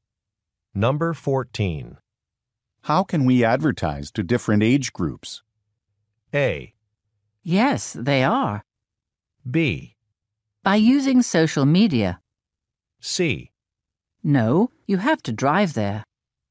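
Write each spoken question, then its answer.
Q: How can we advertise to different age groups?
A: B: By using social media.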